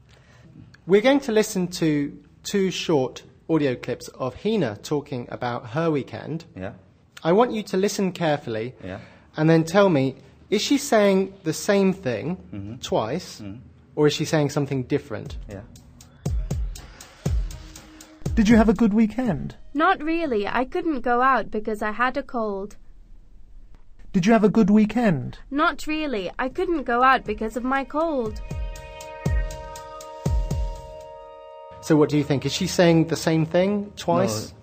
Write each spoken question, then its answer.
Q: Is she saying the same thing twice?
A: You're right to say that the grammar was slightly different, although the meaning was the same.